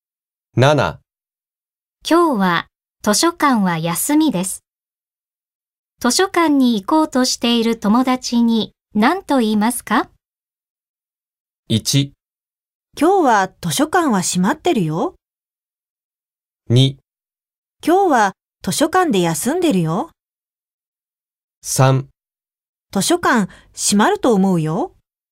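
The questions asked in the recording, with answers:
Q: 今日は図書館は休みです。図書館に行こうとしている友達に何と言いますか?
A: 1: 今日は図書館は閉まってるよ。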